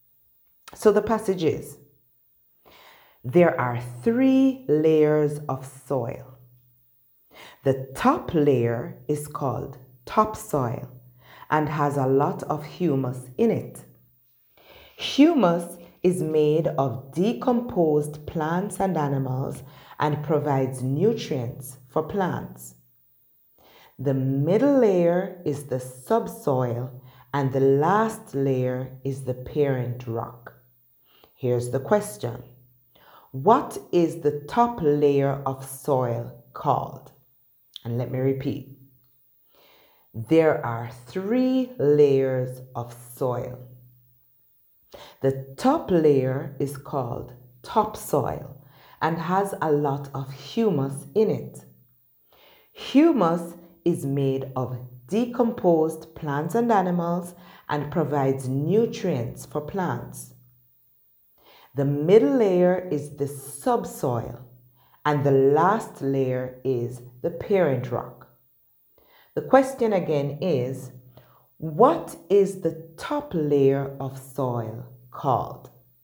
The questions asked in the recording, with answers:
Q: What is the top layer of soil called?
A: The answer is topsoil.